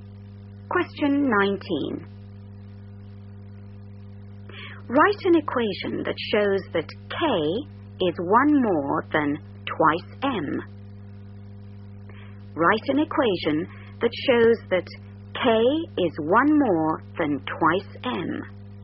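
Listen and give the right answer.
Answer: K = 2M + 1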